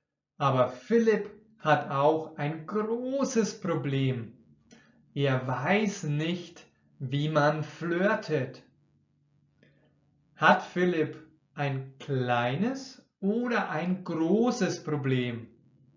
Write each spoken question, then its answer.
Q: Hat Philipp ein kleines oder ein großes Problem.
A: Er hat ein großes Problem.